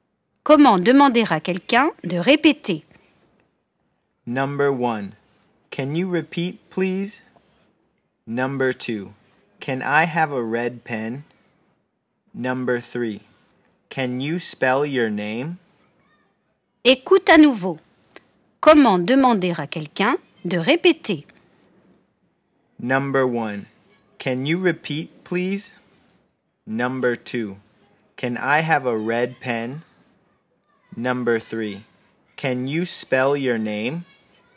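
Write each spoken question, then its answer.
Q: Comment demander à quelqu'un de répéter?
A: 1: Can you repeat, please?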